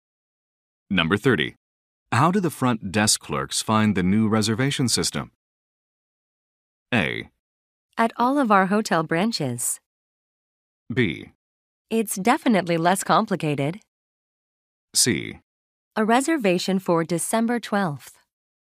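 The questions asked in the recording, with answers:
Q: How do the front desk clerks find the new reservation system?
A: B: It's definitely less complicated.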